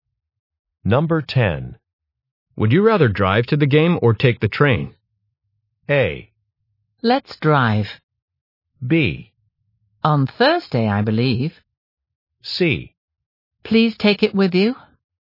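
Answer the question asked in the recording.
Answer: A: Let's drive.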